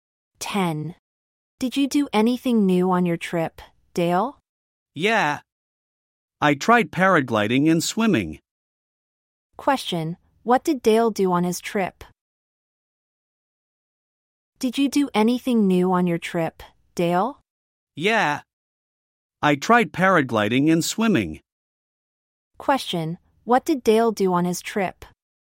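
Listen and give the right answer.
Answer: He tried paragliding and swimming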